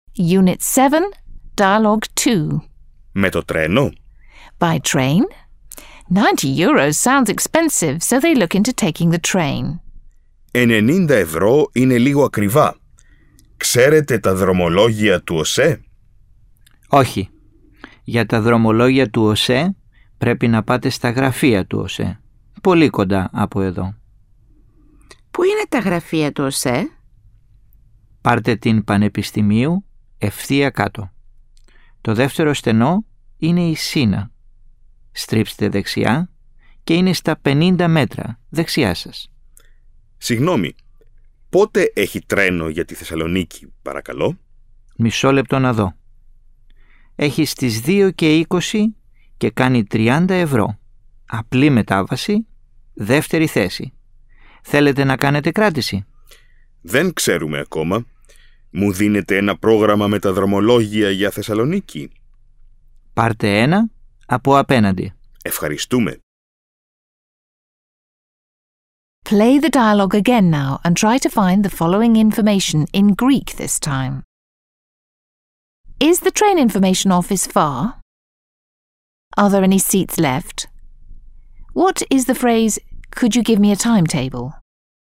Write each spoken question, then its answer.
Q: Is the train information office far?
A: Τα γραφεία του ΟΣΕ είναι πολύ κοντά.

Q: What is the phrase, could you give me a timetable?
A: Μου δίνετε ένα πρόγραμμα με τα δρομολόγια?